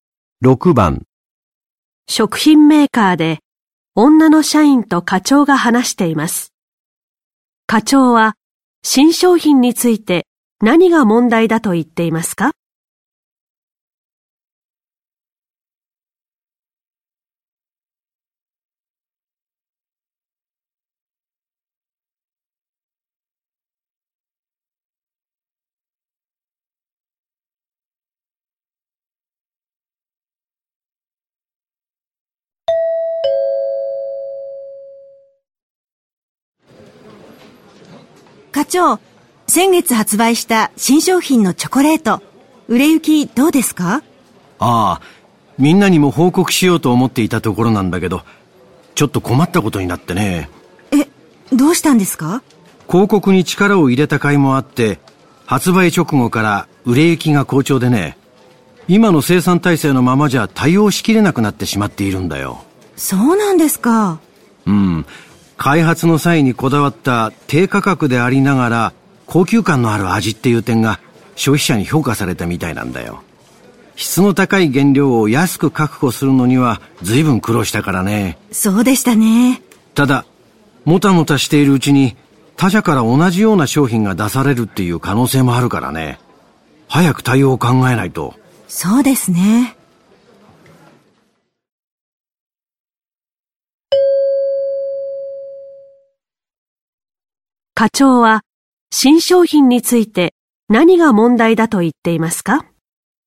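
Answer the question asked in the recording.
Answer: 生産が売れ行きに追いつかない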